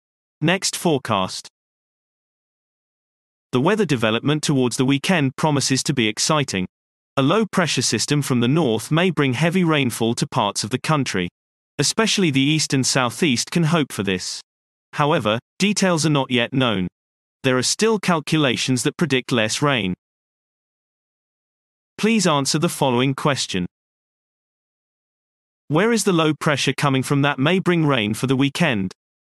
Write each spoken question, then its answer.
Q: Where is the low pressure coming from that may bring rain for the weekend?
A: The low is coming from the north.